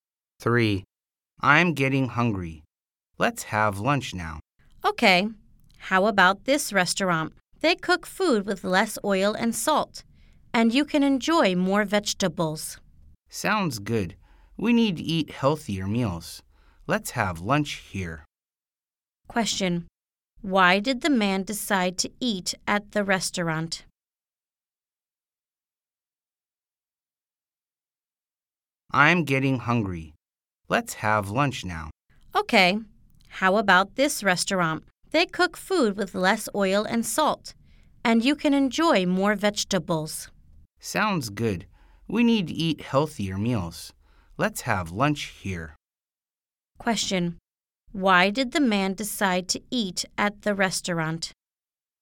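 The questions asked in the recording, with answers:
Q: Question. Why did the man decide to eat at the restaurant?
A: They cook food with less oil and salt and more vegetables; it's healthier.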